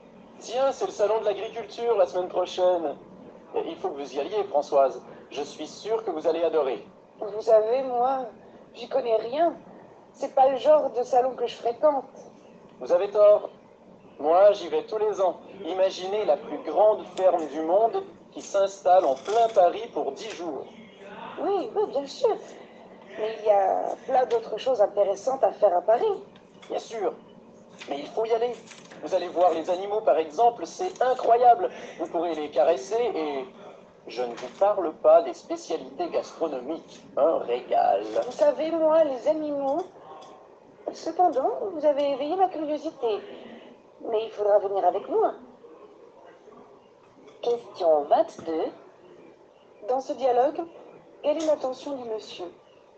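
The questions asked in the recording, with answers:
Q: Dans ce dialogue, quelle est l'intention du monsieur ?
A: Convaincre Françoise d'aller au salon de l'agriculture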